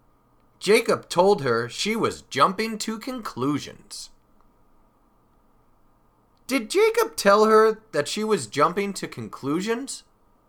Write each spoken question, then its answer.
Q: Did Jacob tell her that she was jumping to conclusions?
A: Yes, he did. Jacob told her she was jumping to conclusions.